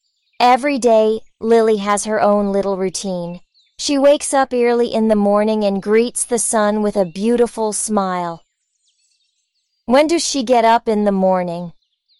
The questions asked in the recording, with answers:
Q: When does she get up in the morning?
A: Early. She gets up early in the morning.